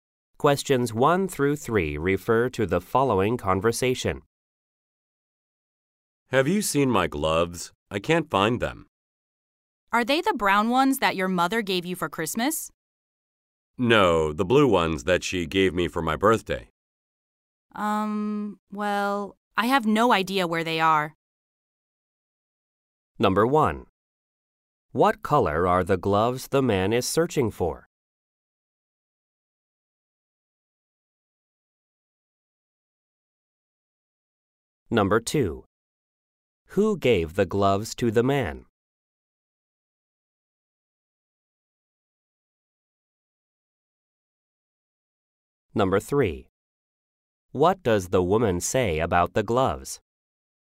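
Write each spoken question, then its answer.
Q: What color are the gloves the man is searching for?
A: Blue

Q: Who gave the gloves to the man?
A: His mother

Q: What does the woman say about the gloves?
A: She has no idea where they are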